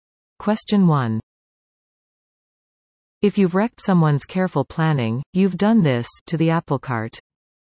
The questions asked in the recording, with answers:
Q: If you've wrecked someone's careful planning, you've done this to the apple cart.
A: Upset.